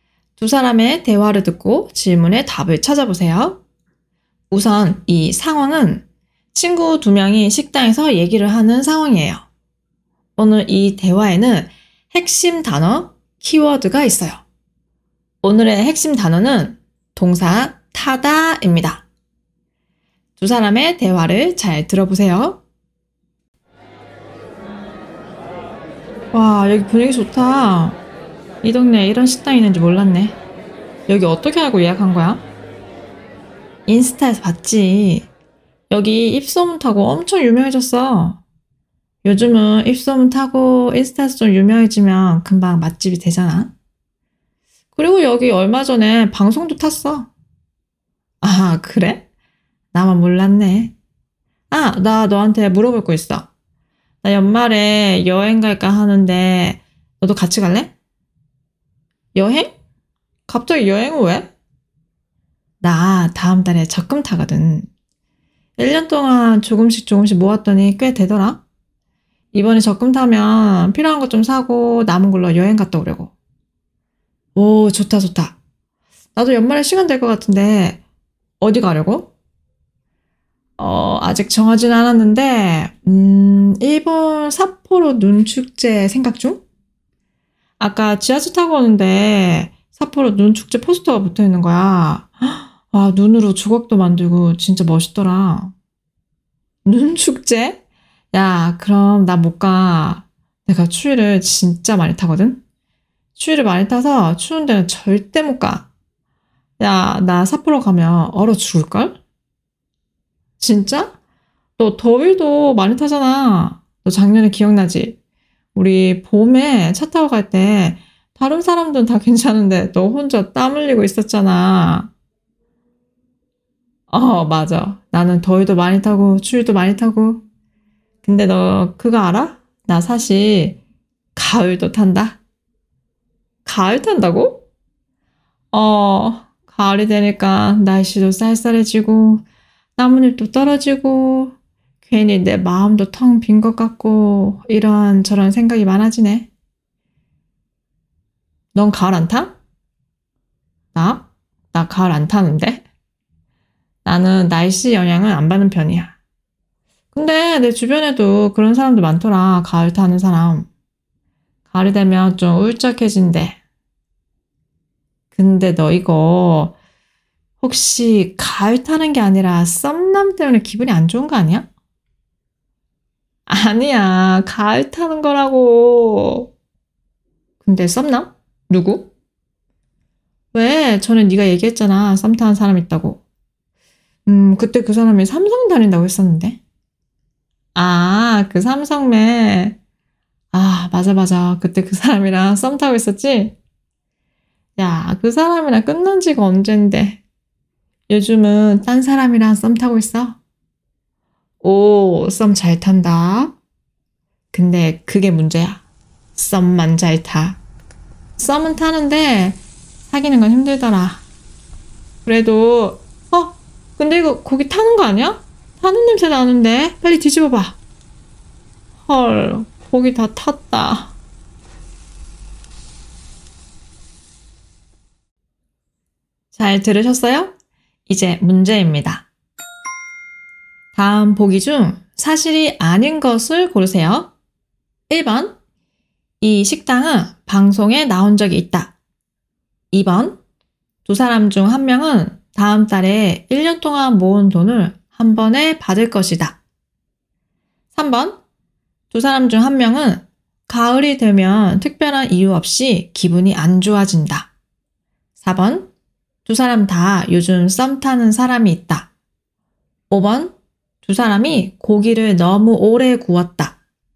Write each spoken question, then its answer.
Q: 다음 보기 중 사실이 아닌 것을 고르세요.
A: 오늘 문제의 정답은 4번입니다.